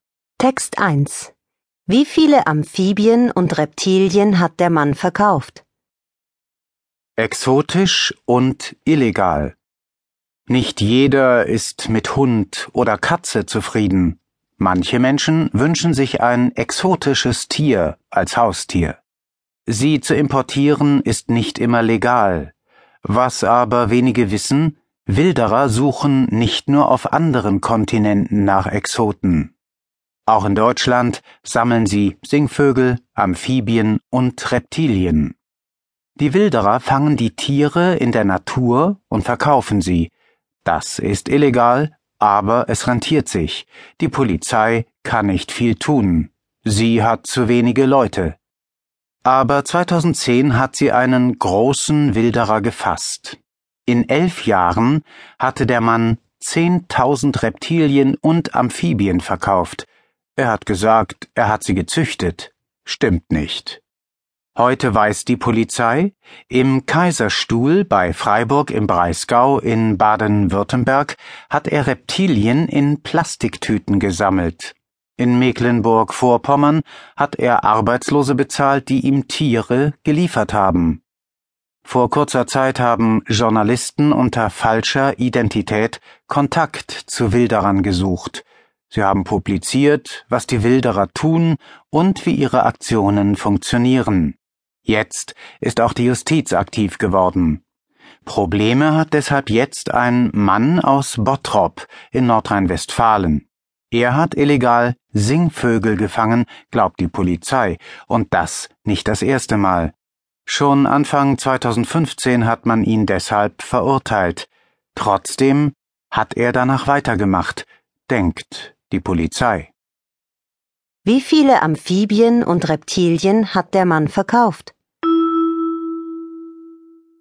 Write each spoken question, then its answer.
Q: Wie viele Amphibien und Reptilien hat der Mann verkauft?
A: Er hat 10.000 Reptilien und Amphibien verkauft.